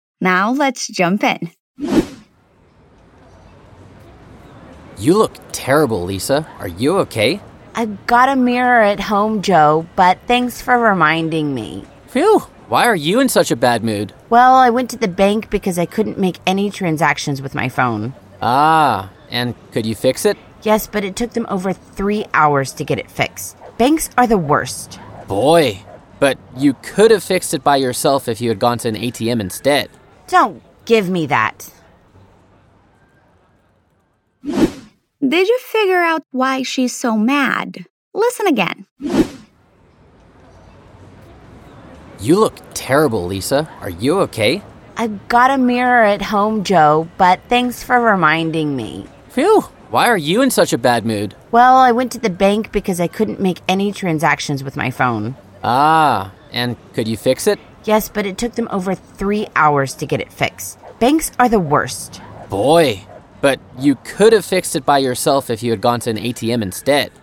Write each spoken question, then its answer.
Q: Did you figure out why she's so mad?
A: She's angry about something to do with the bank.